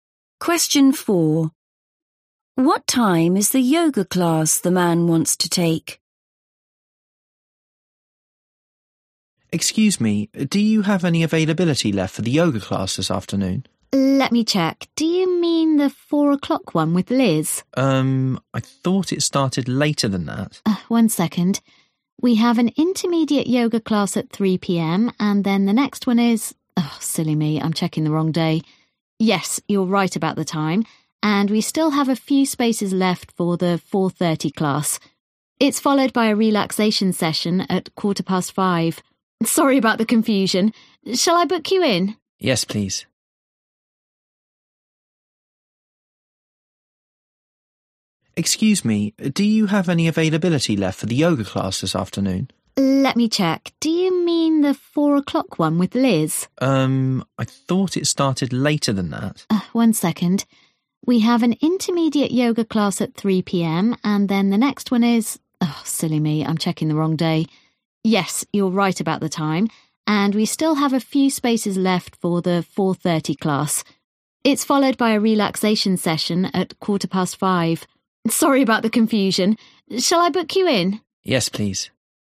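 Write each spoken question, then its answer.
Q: What time is the yoga class the man wants to take?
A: 4:30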